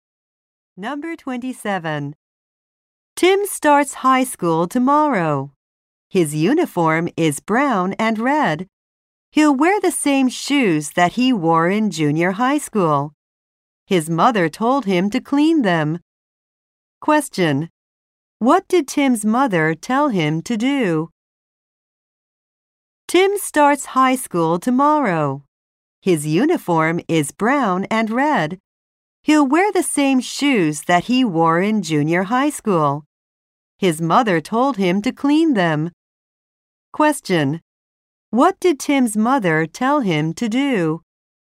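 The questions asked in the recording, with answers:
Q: What did Tim's mother tell him to do?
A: Clean his shoes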